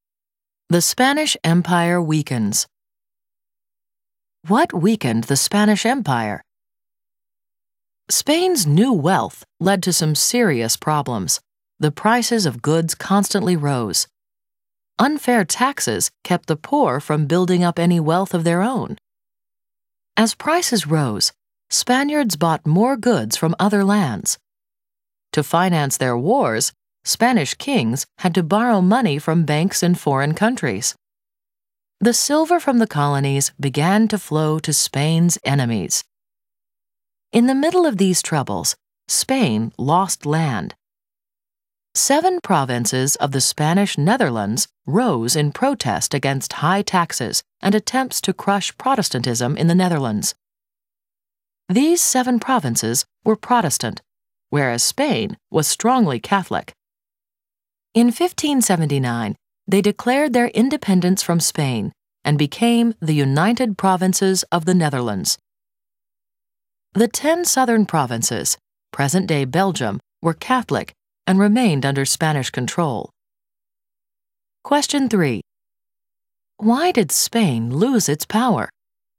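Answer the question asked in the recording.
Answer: Rising prices, unfair taxes, foreign debts and loss of the Dutch provinces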